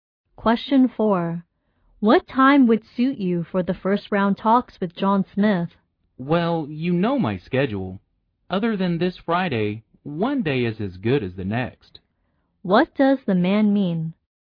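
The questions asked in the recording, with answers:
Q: What does the man mean?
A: Any day except this Friday is fine.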